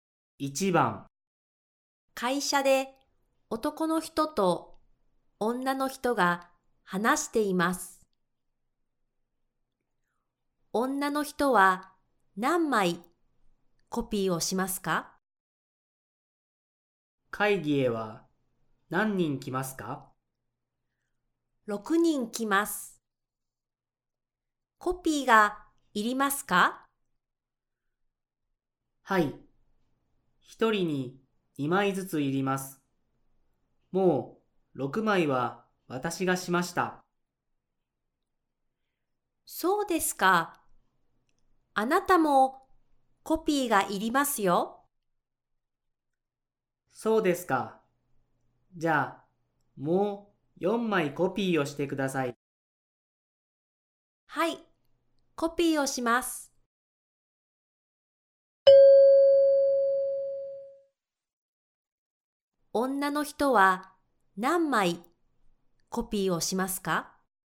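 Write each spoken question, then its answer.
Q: 女の人は何枚コピーをしますか?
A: 4枚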